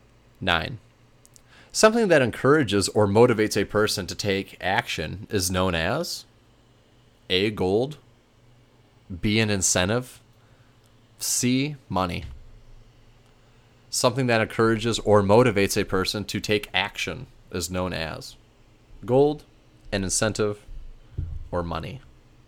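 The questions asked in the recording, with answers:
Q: Something that encourages or motivates a person to take action is known as A, gold, B, an incentive, C, money.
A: B: an incentive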